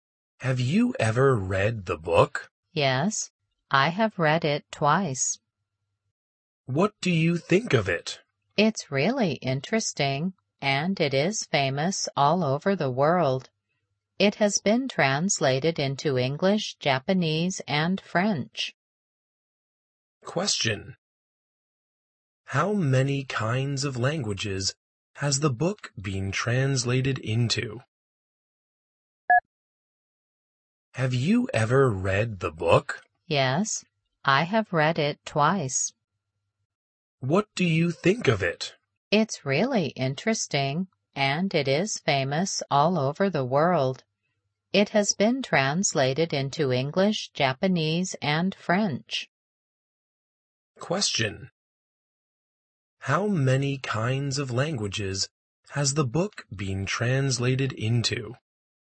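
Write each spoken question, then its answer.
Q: How many kinds of languages has the book been translated into?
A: Three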